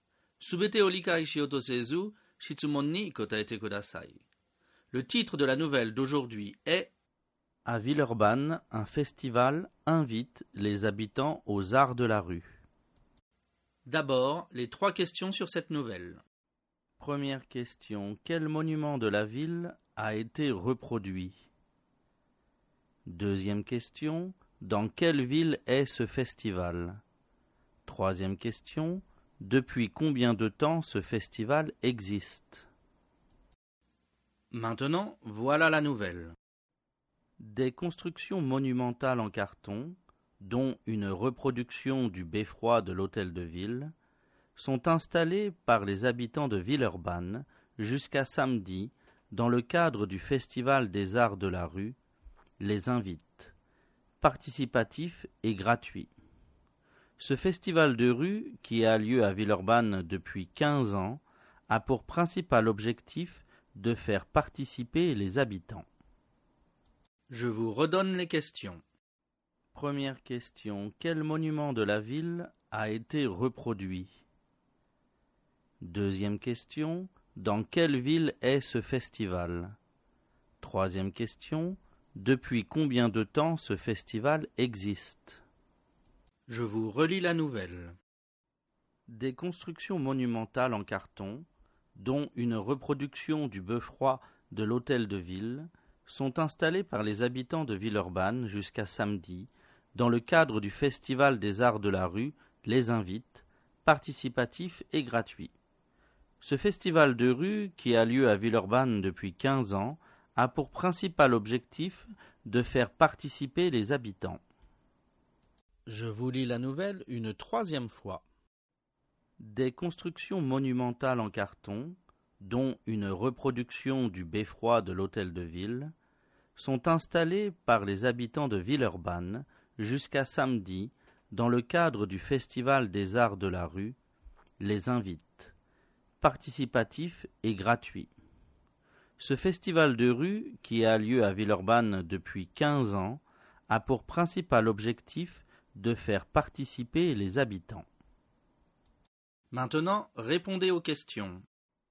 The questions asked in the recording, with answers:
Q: quel monument de la ville a été reproduit?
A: Le beffroi de l'hôtel de ville a été reproduit.

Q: dans quelle ville est ce festival?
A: Ce festival est à Villeurbanne.

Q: depuis combien de temps ce festival existe?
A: Ce festival existe depuis 15 ans.